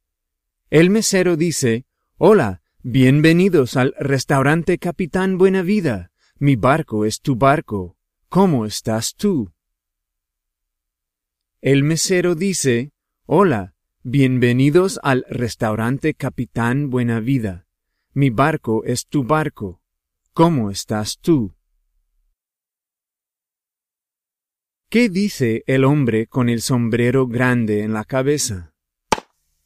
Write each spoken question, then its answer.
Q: ¿Qué dice el hombre con el sombrero grande en la cabeza?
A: Afortunadamente, el mesero que tiene un menú en la mano dice, «Hola, bienvenidos al restaurante Capitán Buen Vida.